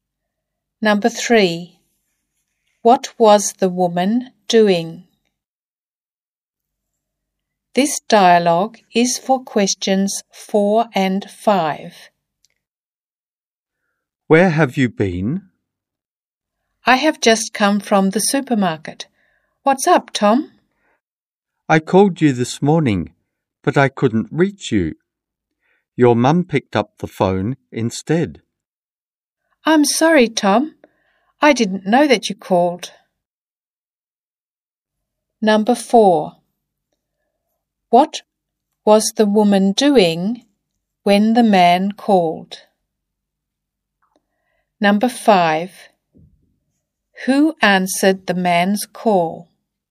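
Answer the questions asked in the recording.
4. She was at the supermarket
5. The woman's mum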